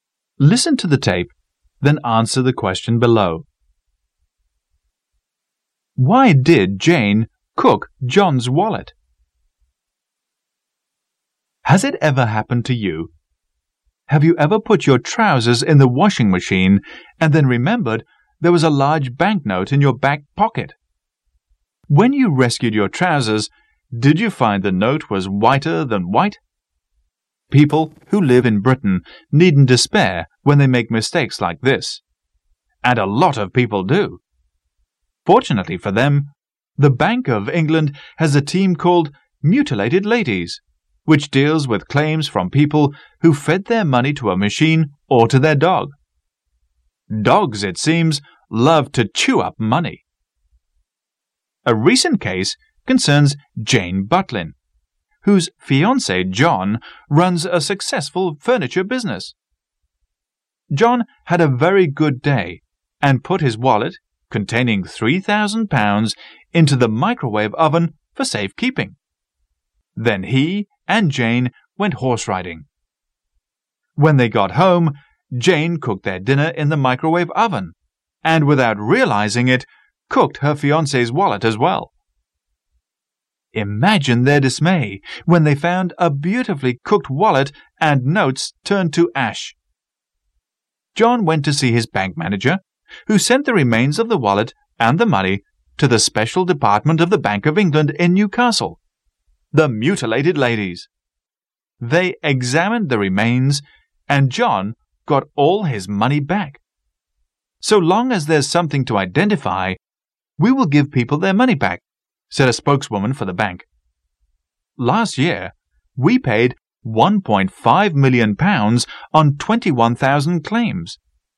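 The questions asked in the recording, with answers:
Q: Why did Jane cook John's wallet?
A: She didn't know it was in the microwave oven, where John had put it for safekeeping.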